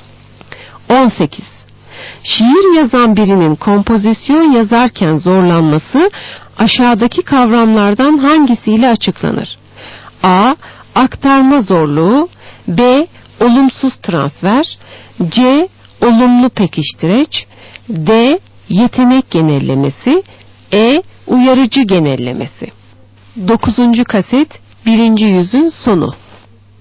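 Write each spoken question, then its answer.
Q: Şiir yazan birinin kompozisyon yazarken zorlanması aşağıdaki kavramlardan hangisiyle açıklanır?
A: B: Olumsuz transfer.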